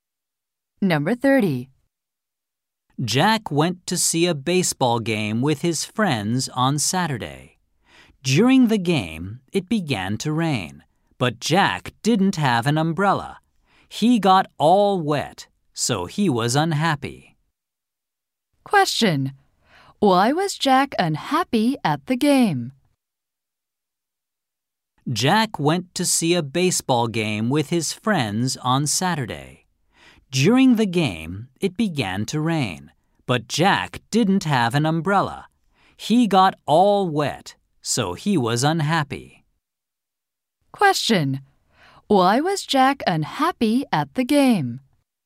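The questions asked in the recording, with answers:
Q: Question. Why was Jack unhappy at the game?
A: He got wet in the rain because he had no umbrella.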